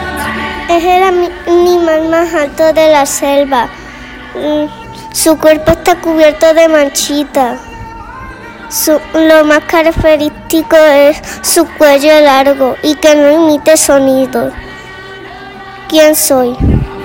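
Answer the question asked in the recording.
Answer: la jirafa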